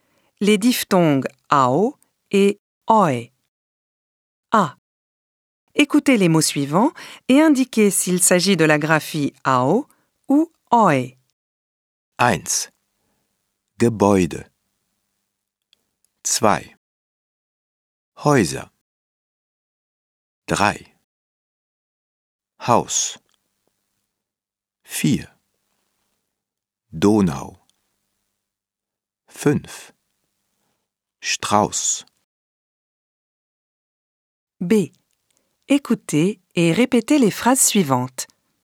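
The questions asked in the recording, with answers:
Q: Gebäude.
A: oi (graphie äu)

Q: Häuser.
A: oi (graphie äu)

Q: Haus.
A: au

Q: Donau.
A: au

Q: Strauss.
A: au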